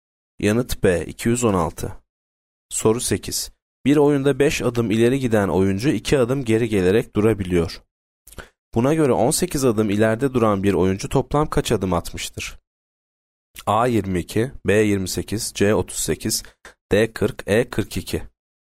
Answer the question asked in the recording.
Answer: Yanıt E 42.